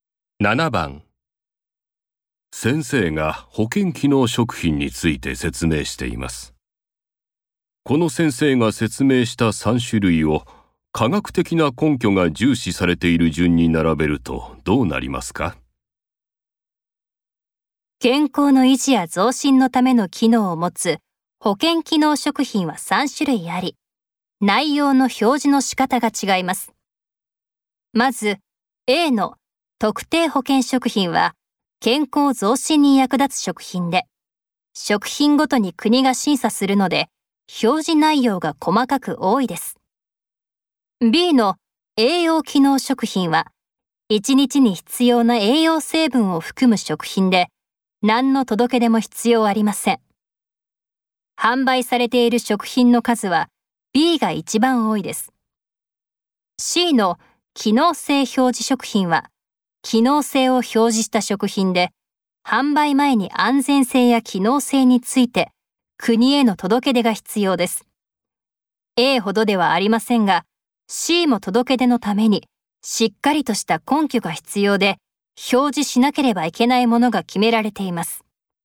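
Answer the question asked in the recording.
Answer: A(特定保健食品)→C(機能性表示食品)→B(栄養機能食品)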